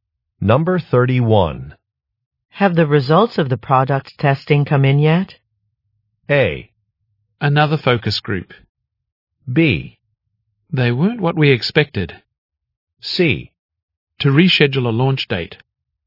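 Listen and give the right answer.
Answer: B: They weren't what we expected.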